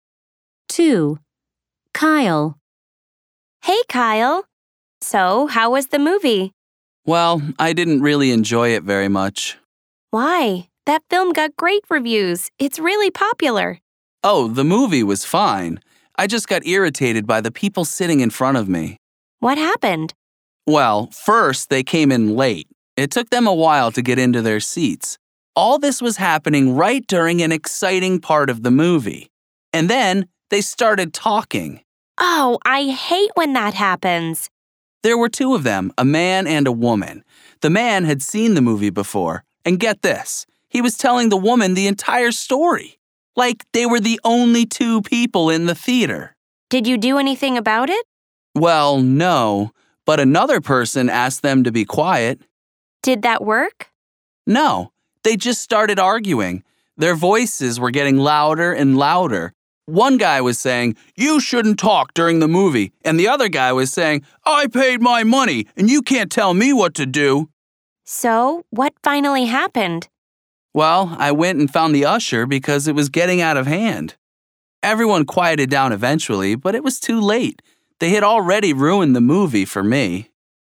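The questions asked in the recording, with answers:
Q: 2. Kyle.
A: People in front of him at the movie came in late and talked during the movie.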